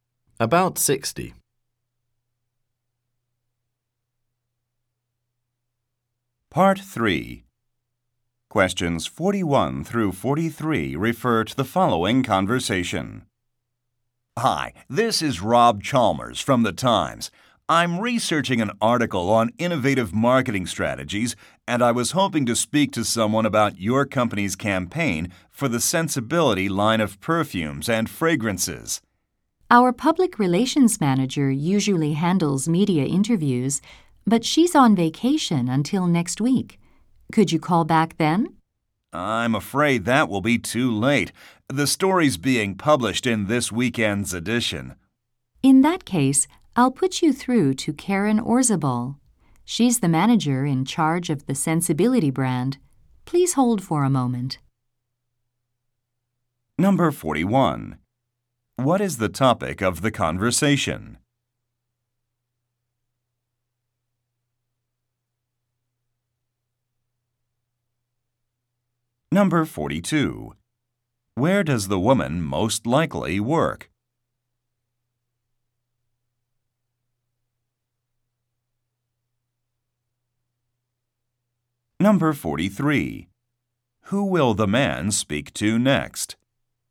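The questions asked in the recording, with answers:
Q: What is the topic of the conversation?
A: The marketing campaign for the Sensibility perfumes

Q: Where does the woman most likely work?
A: At a perfume company

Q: Who will the man speak to next?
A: Karen Orzabal, the Sensibility brand manager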